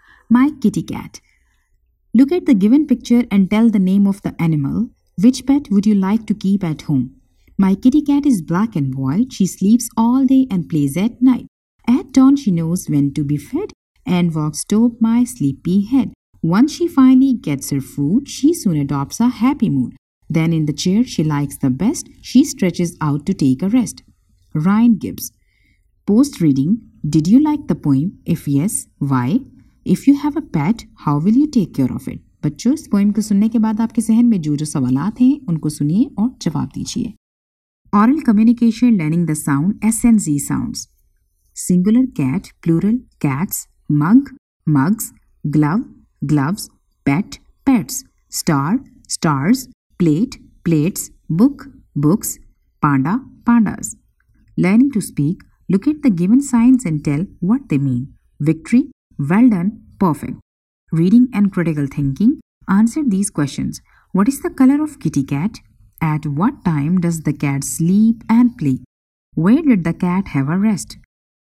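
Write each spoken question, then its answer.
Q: What is the color of kitty cat?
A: Black and white

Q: At what time does the cat sleep and play?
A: She sleeps all day and plays at night

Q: Where did the cat have a rest?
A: In the chair she likes the best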